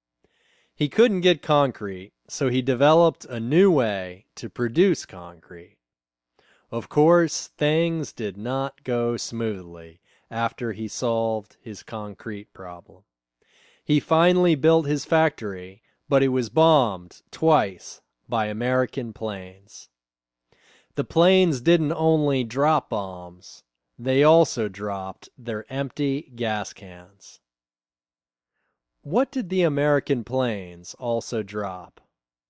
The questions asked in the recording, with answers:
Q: What did the American planes also drop?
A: They also dropped their empty gas cans.